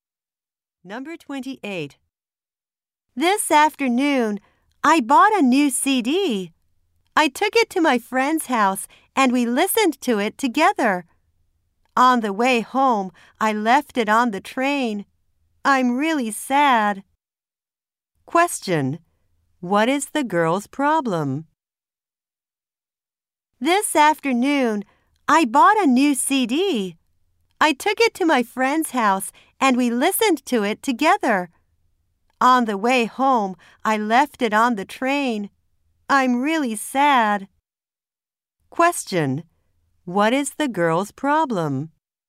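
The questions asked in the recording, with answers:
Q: What is the girl's problem?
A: She left her new CD on the train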